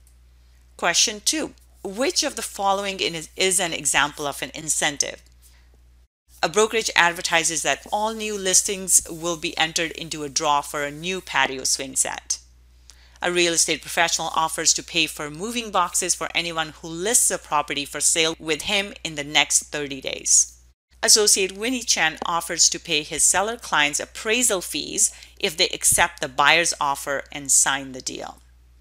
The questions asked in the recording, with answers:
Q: Question two, which of the following is an example of an incentive?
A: The correct answer is A.